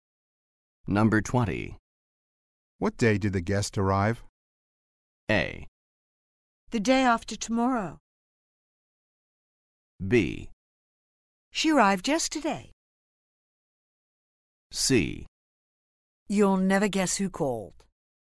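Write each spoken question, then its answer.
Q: What day did the guest arrive?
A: B: She arrived yesterday.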